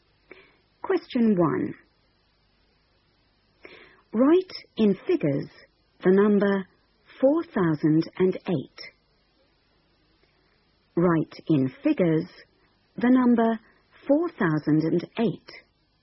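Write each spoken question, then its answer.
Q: Write in figures the number 4008.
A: 4008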